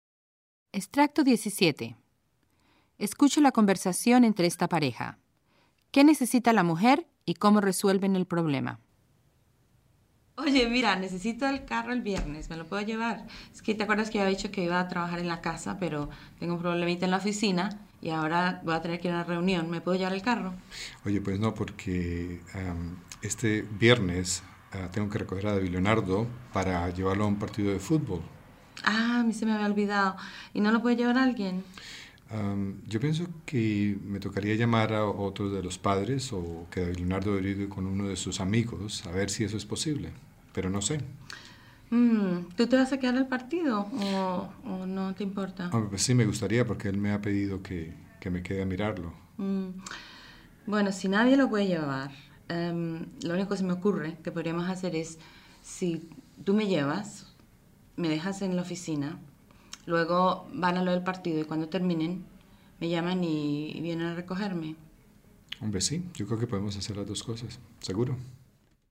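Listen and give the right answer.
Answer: Necesita el carro el viernes para una reunión; él la lleva a la oficina, va al partido con David Leonardo y luego la recogen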